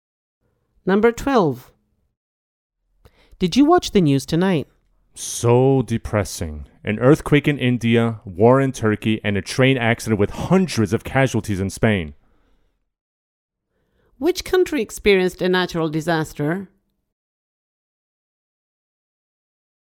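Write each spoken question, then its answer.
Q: Which country experienced a natural disaster?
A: India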